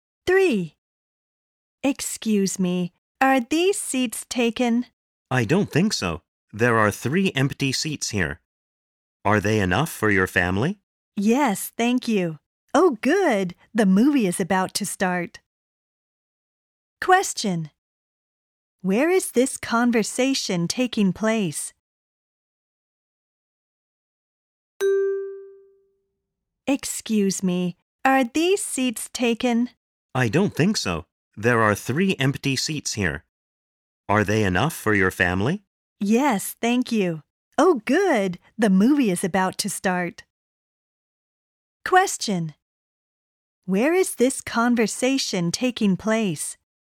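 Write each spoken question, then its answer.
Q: Where is this conversation taking place?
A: At a movie theater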